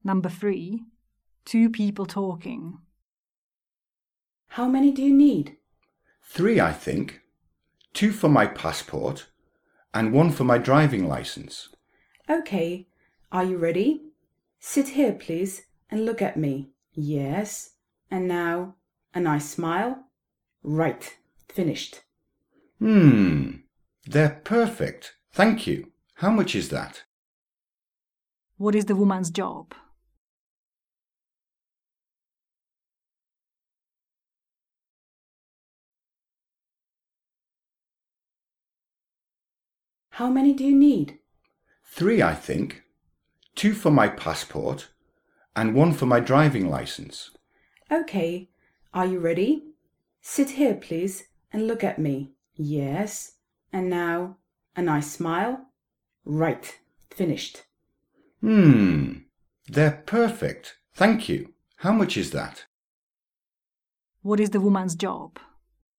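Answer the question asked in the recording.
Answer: photographer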